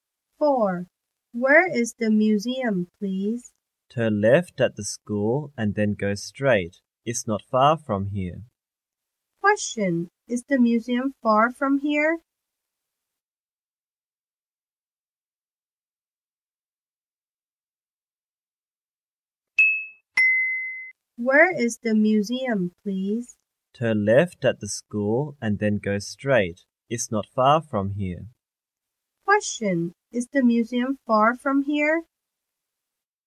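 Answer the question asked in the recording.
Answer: No, it isn't.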